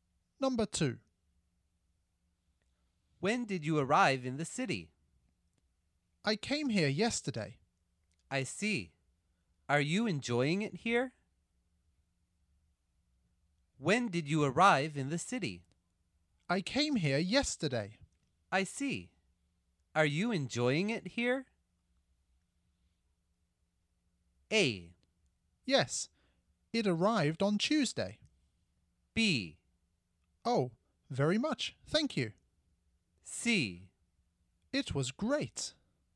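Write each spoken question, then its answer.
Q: I see. Are you enjoying it here?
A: B: Oh, very much. Thank you.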